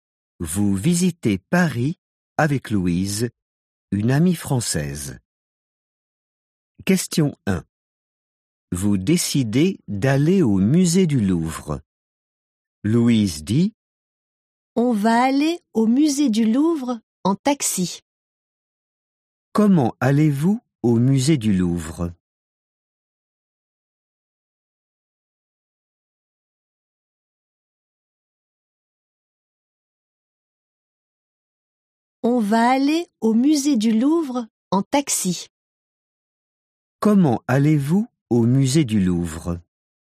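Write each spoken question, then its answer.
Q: Comment allez-vous au musée du Louvre?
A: En taxi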